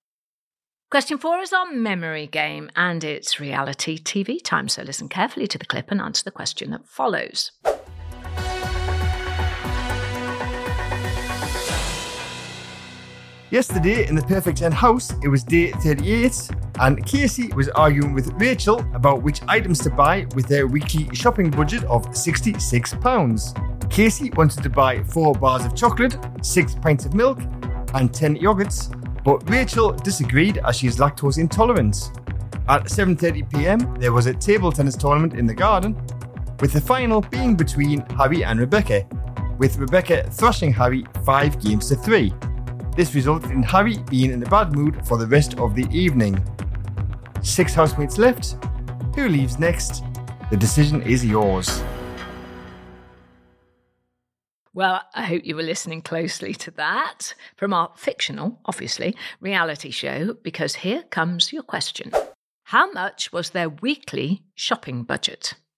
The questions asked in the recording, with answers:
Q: How much was their weekly shopping budget?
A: And the amount you were looking for was £66.